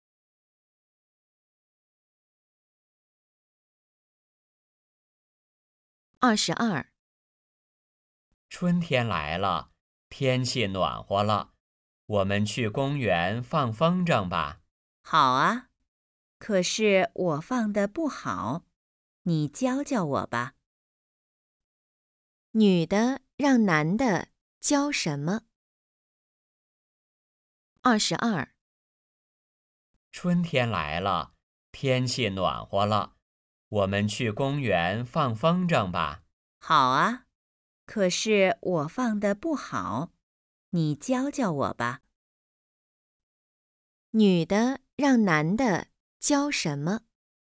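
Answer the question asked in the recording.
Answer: 放风筝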